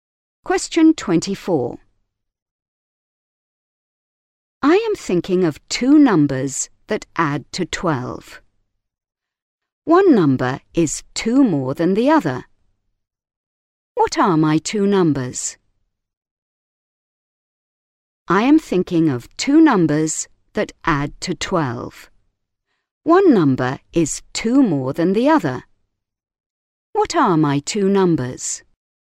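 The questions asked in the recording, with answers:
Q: What are my 2 numbers?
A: 5 and 7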